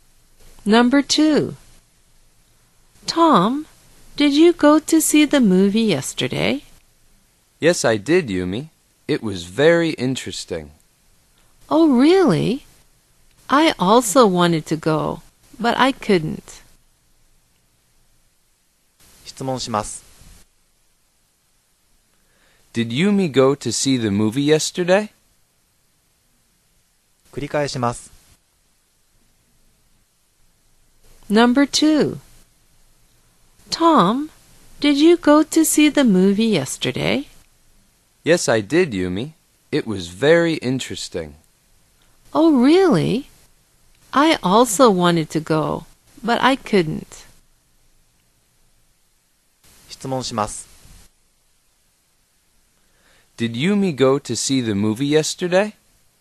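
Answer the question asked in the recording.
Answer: No, she didn't.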